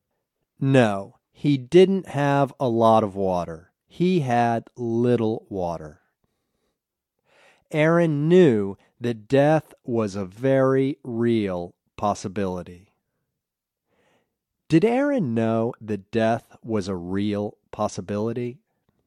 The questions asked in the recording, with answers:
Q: Did Aaron know that death was a real possibility?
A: Yes, Aaron knew that death was a very real possibility.